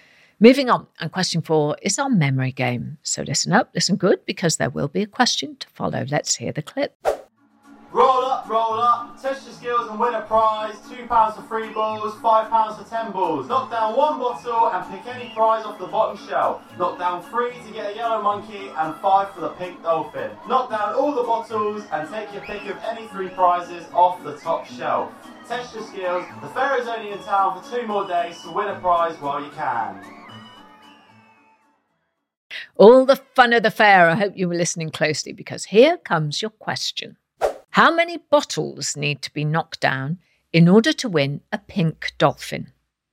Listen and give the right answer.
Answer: The answer is 5, 5 bottles.